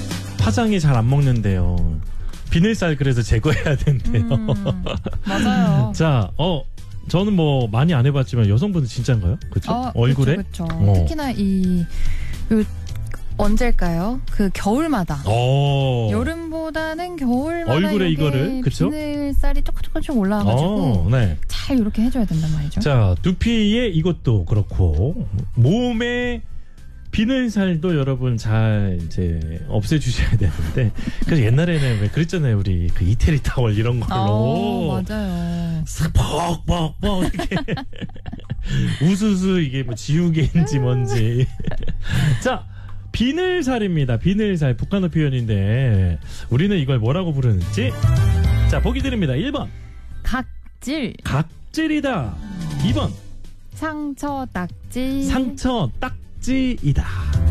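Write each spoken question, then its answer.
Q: 비늘살 북한어 표현인데 우리는 이걸 뭐라고 부르는지 자 보기 드립니다.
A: 1: 각질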